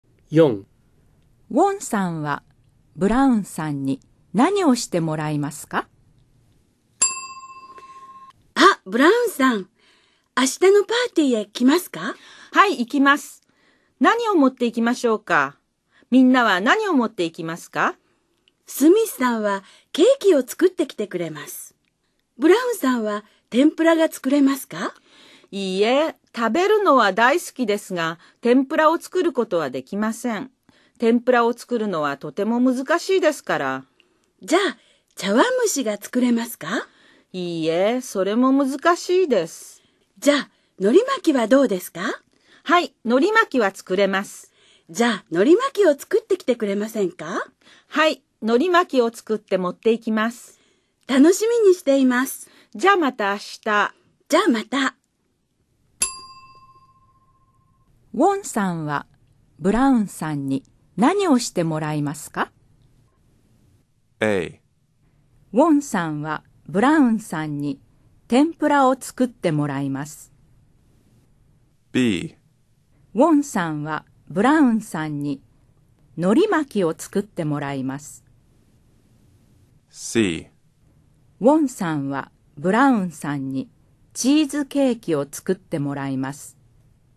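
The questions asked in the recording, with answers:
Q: ウォンさんはブラウンさんに何をしてもらいますか?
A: B: ウォンさんはブラウンさんに海苔巻きを作ってもらいます。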